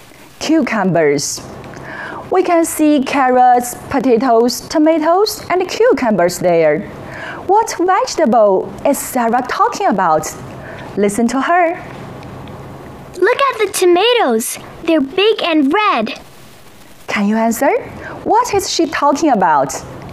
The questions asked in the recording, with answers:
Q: What is she talking about?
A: Sarah is talking about tomatoes.